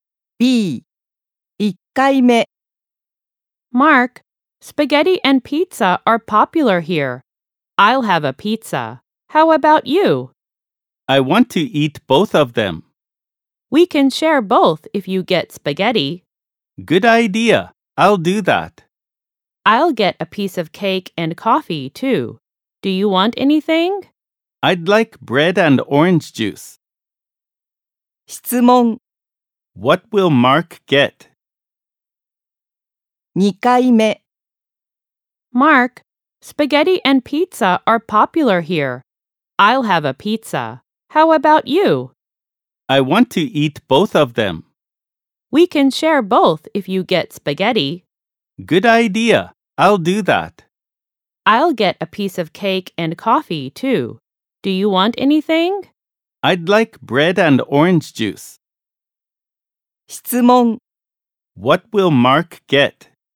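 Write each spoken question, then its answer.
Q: What will Mark get?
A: Spaghetti, bread and orange juice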